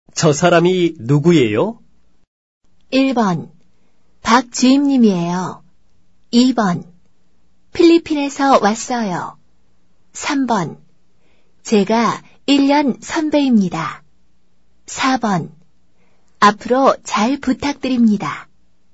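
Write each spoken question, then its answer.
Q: 저 사람이 누구예요?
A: 1: 박지임님이에요.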